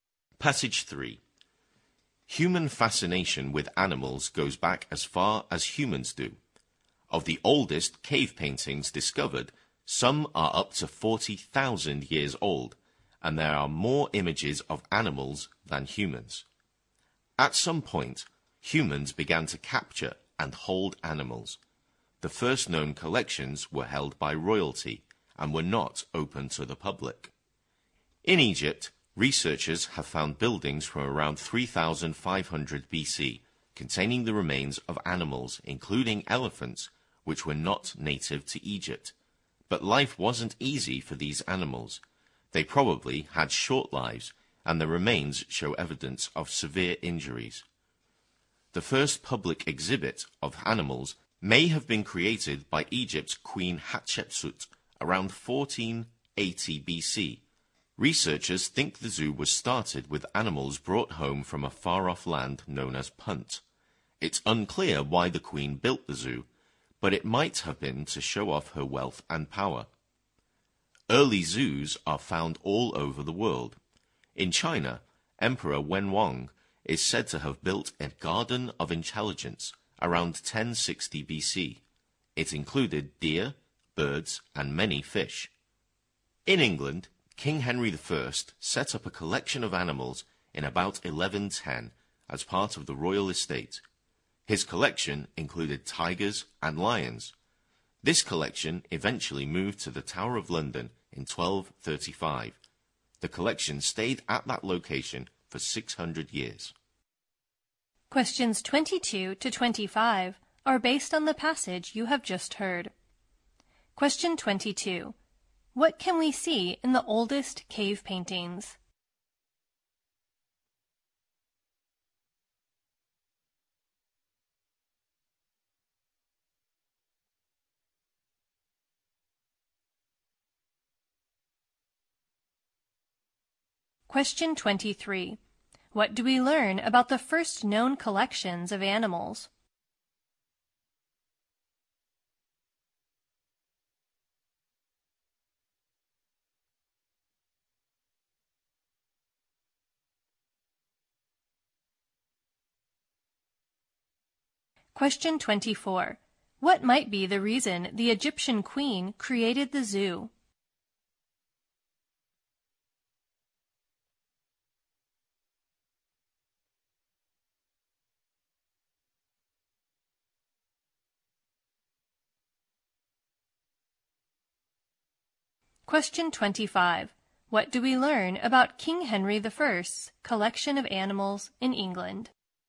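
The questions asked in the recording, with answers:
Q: What can we see in the oldest cave paintings?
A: More images of animals than of humans

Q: What do we learn about the first known collections of animals?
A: Royalty kept them, and they were not open to the public.

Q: What might be the reason the Egyptian queen created the zoo?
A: To show off her wealth and power

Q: What do we learn about King Henry I's collection of animals in England?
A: It included tigers and lions, moved to the Tower of London in 1235 and stayed there 600 years.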